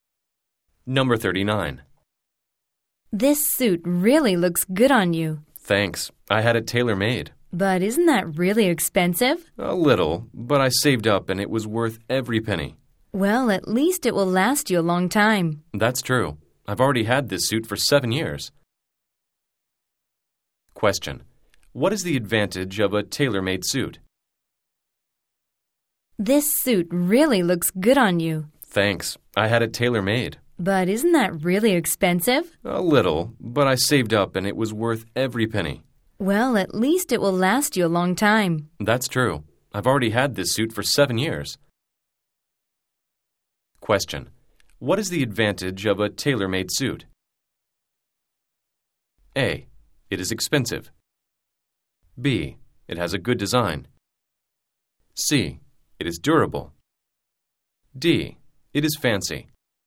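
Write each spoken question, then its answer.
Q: What is the advantage of a tailor-made suit?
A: C: It is durable.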